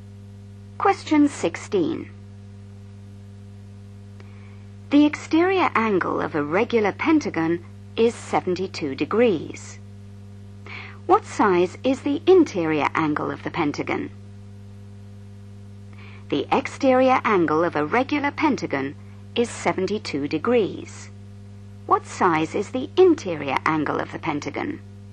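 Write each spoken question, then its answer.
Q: What size is the interior angle of the pentagon?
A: 108 degrees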